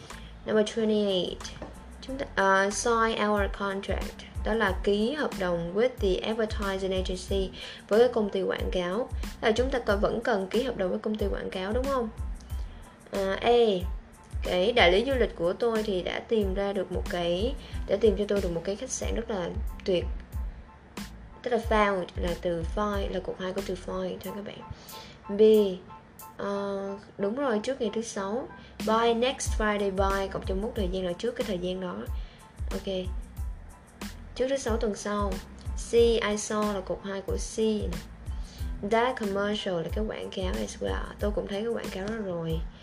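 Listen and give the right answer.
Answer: B: Đúng rồi, trước thứ 6 tuần sau.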